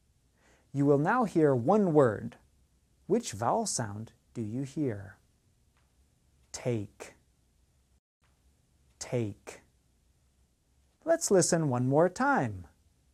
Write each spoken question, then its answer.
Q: Which vowel sound do you hear?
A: The answer is A, take.